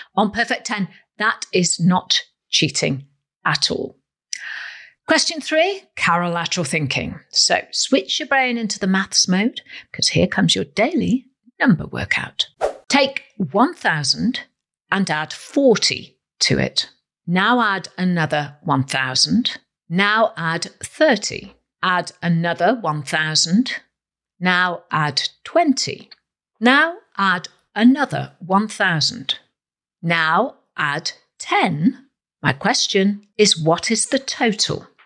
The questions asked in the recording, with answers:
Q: My question is, what is the total?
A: Well, the correct answer is 4,100.